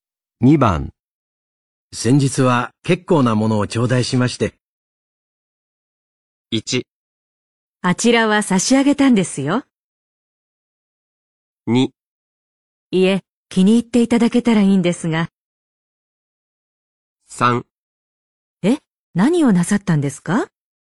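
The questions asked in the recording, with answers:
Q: 先日は結構なものを頂戴しまして。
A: 2: いえ、気に入っていただけたらいいんですが。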